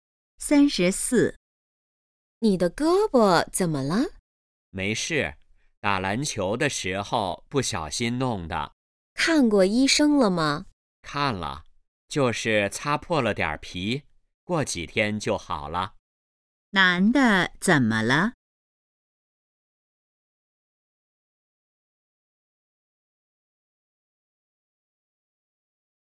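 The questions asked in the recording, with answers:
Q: 男的怎么了?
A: 打篮球时胳膊擦破了皮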